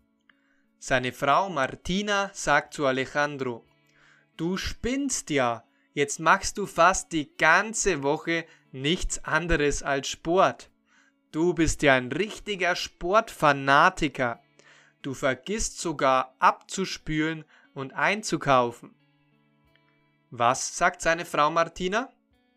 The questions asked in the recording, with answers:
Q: Was sagt seine Frau Martina?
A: Sie sagt: Du spinnst ja, jetzt machst du fast die ganze Woche nichts anderes als Sport.